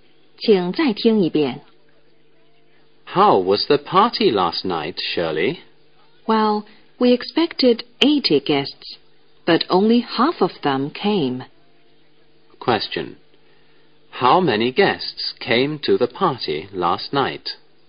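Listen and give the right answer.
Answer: 40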